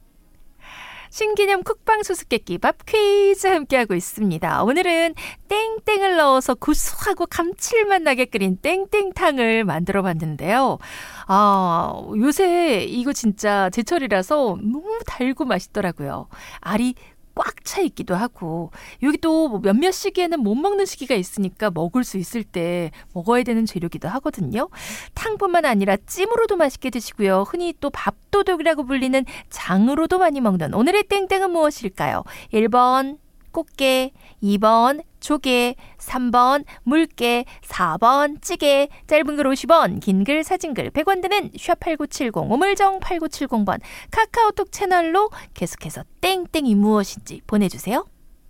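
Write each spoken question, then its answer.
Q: 탕뿐만 아니라 찜으로도 맛있게 드시고요. 흔히 또 밥도둑이라고 불리는 장으로도 많이 먹는 오늘의 땡땡은 무엇일까요?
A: 1: 꽃게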